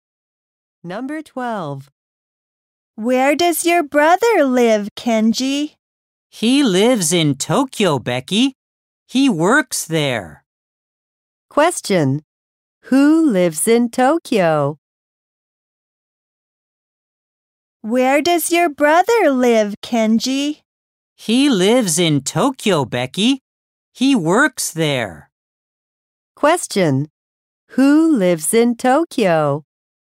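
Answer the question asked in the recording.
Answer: Kenji's brother.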